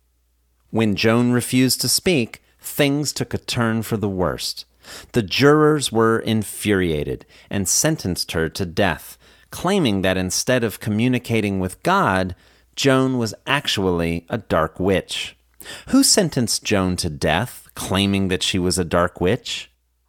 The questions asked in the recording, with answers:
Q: Who sentenced Joan to death, claiming that she was a dark witch?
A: The jurors sentenced Joan to death, claiming that she was a dark witch.